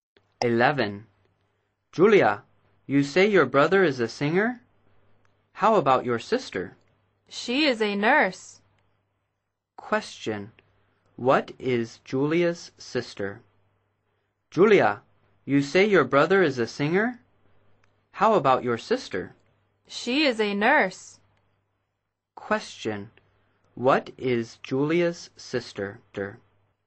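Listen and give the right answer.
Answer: A nurse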